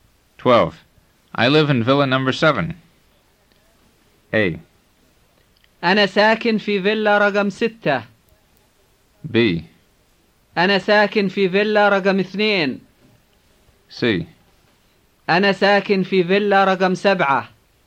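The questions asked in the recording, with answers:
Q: I live in villa number 7.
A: C: أنا ساكن في فيلا رقم 7.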